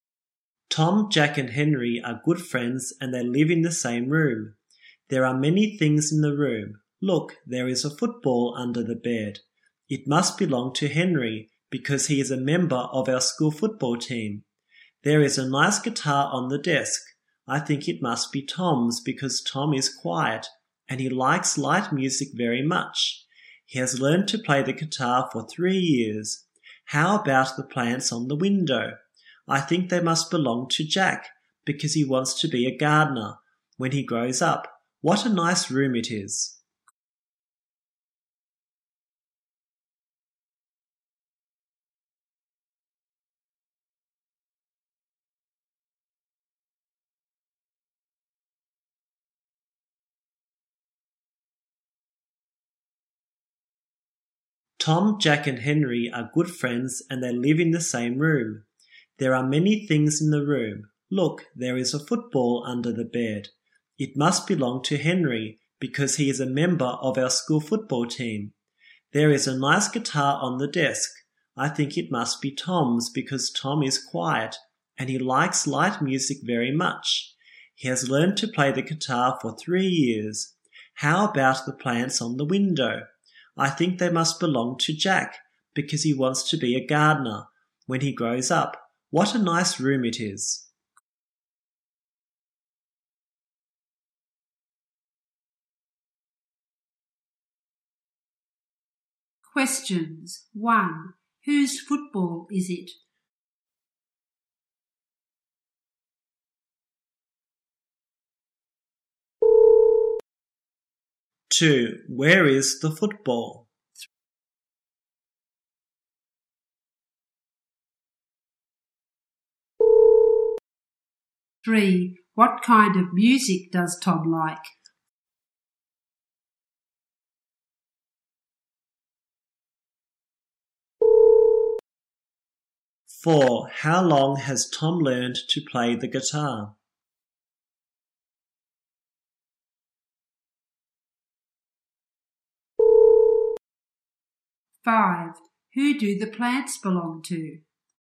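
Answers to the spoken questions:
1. Henry's
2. Under the bed
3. Light music
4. 3 years
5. Jack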